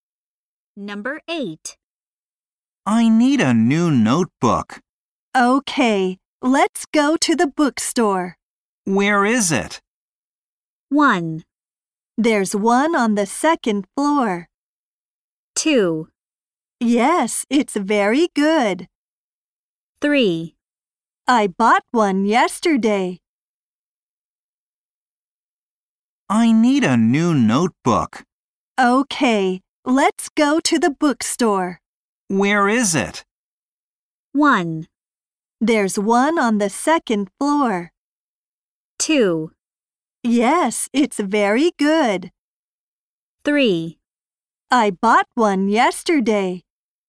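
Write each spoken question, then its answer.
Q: Where is it?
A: 1: There's one on the second floor.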